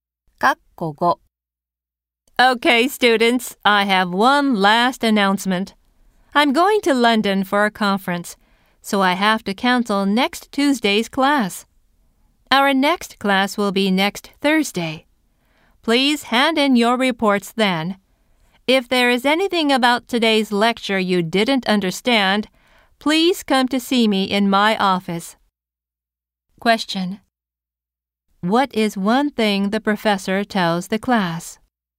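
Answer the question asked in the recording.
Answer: Next Tuesday's class is cancelled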